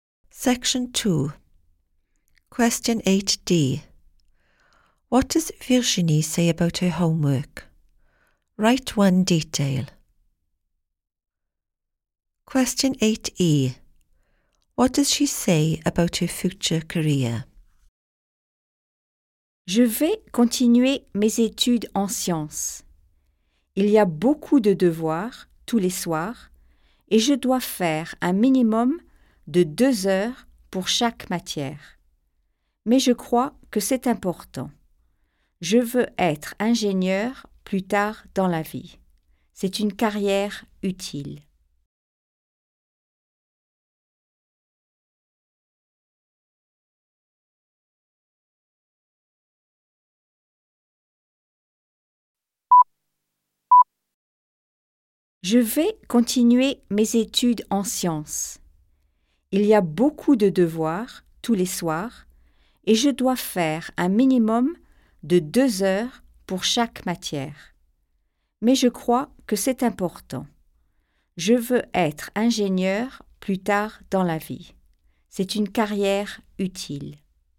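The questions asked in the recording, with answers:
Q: What does Virginie say about her homework?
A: Lots every evening; at least 2 hours per subject; she thinks it is important

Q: What does she say about her future career?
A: She wants to be an engineer; it is a useful career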